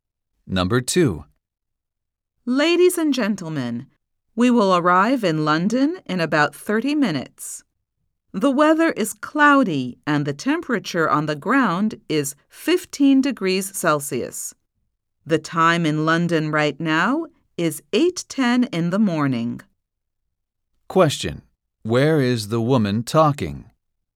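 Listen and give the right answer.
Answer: On a plane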